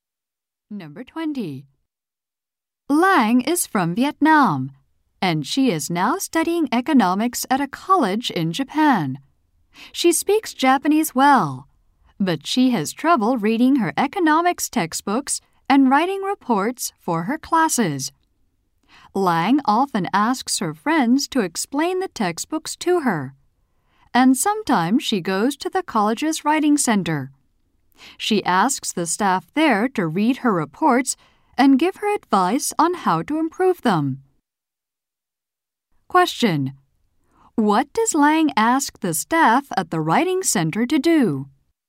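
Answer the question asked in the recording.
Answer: Read her reports and give advice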